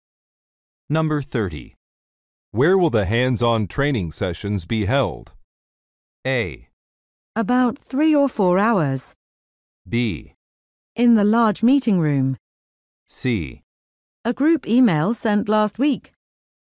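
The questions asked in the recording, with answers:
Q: Where will the hands-on training sessions be held?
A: B: In the large meeting room.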